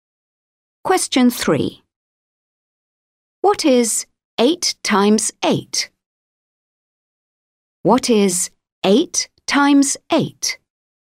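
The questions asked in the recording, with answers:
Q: What is 8 times 8?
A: 64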